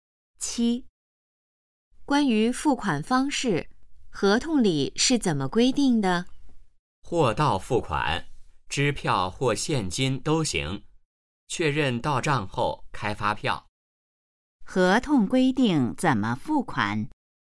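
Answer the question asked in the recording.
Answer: 货到付款,支票或现金都行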